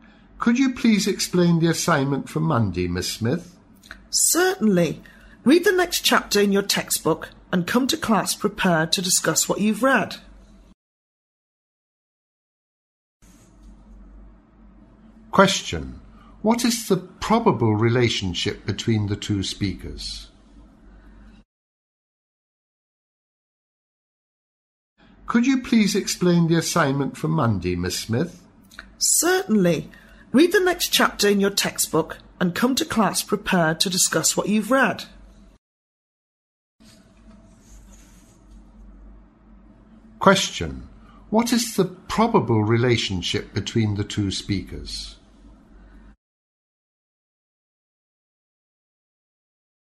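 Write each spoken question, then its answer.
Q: What is the probable relationship between the two speakers?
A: Student and teacher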